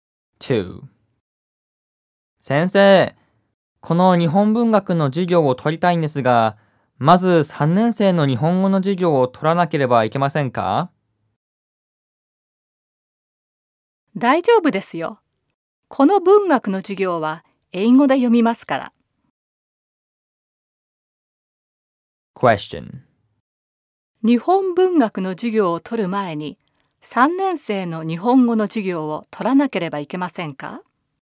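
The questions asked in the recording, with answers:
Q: 日本文学の授業を取る前に、3年生の日本語の授業を取らなければいけませんか?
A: いいえ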